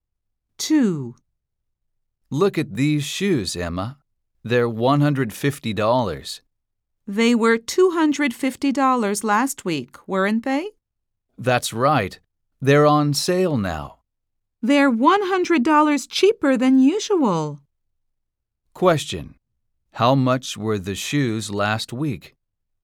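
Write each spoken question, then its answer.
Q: How much were the shoes last week?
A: $250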